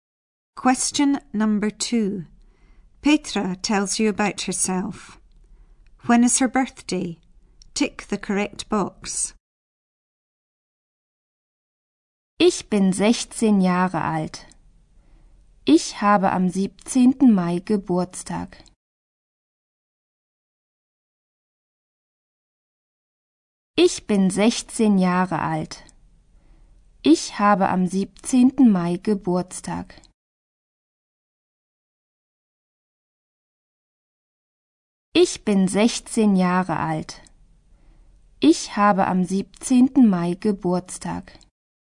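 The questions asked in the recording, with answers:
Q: When is her birthday? Tick the correct box.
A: 17th May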